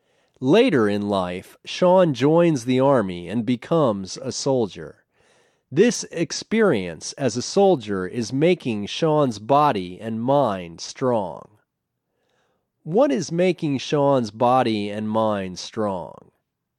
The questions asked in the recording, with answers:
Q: What is making Sean's body and mind strong?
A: His experience as a soldier is making his body and mind strong.